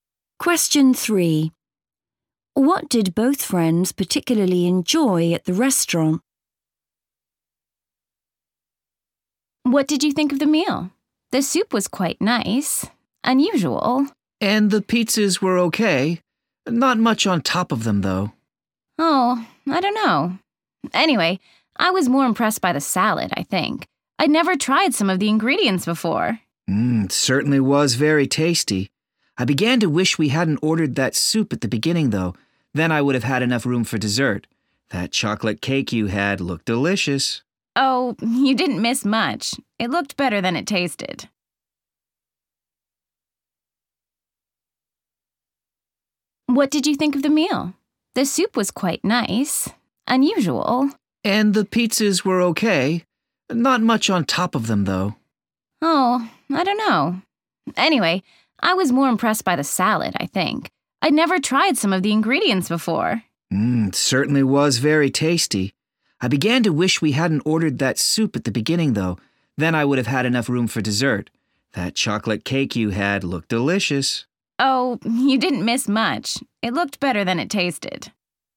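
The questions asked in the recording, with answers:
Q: What did both friends particularly enjoy at the restaurant?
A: the salad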